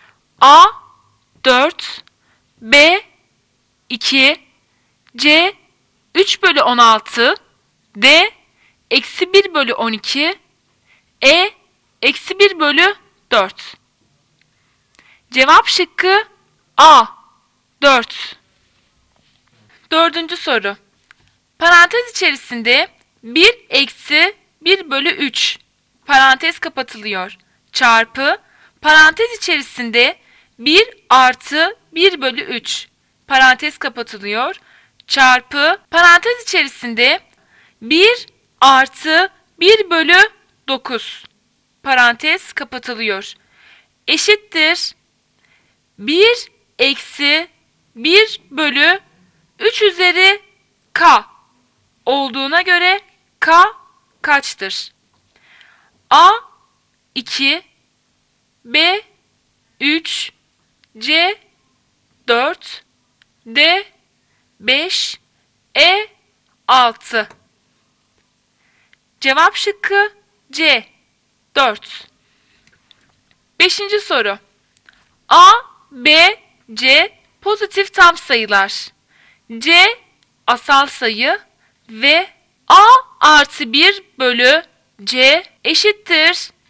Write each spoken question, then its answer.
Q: eşittir 1 eksi 1 bölü 3 üzeri k olduğuna göre k kaçtır?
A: Cevap şıkkı C 4